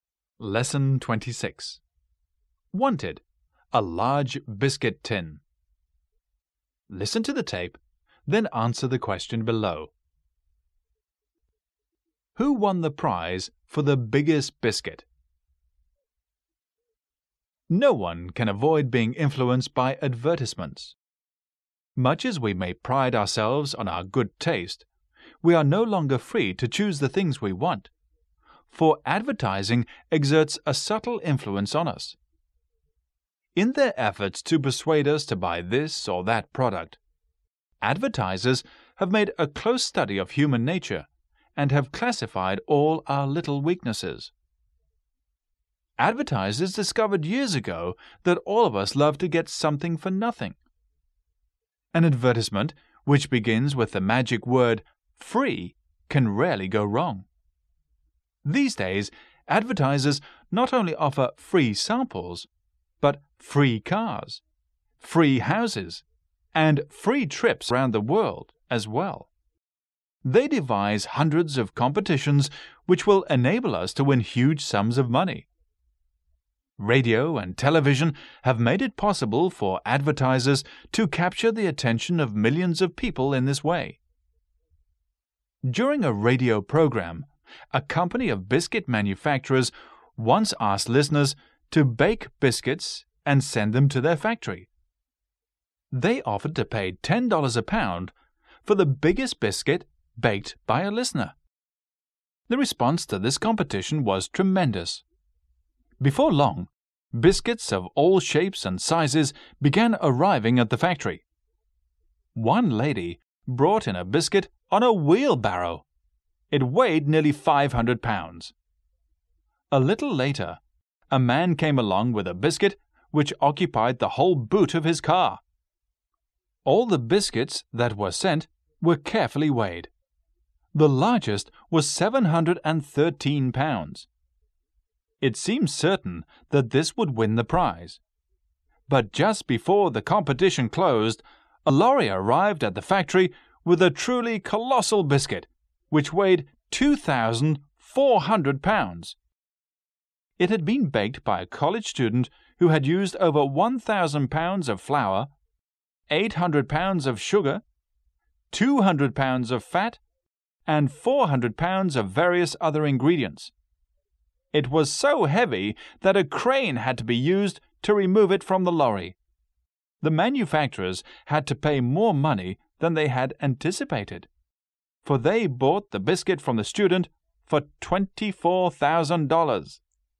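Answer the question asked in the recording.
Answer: A college student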